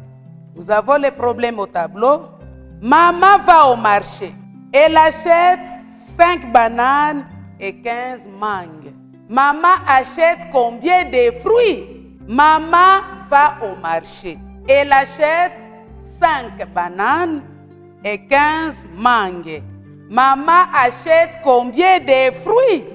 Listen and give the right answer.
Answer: La réponse égale 20.